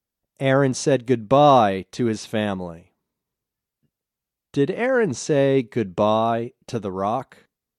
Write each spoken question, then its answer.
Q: Did Aaron say goodbye to the rock?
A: No, Aaron didn't say goodbye to the rock.